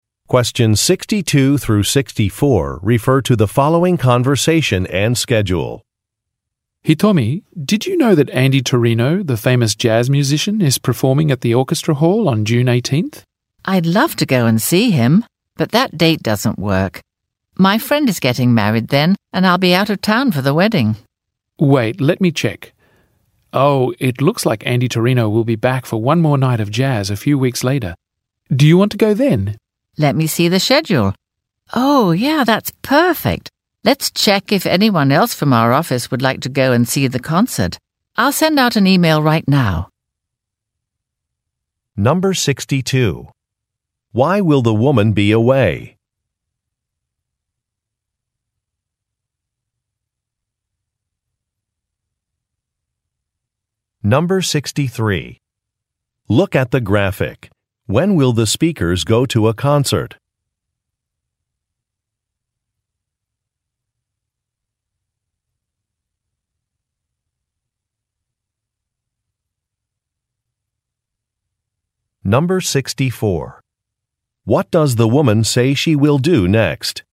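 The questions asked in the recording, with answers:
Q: Why will the woman be away?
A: To attend a friend's wedding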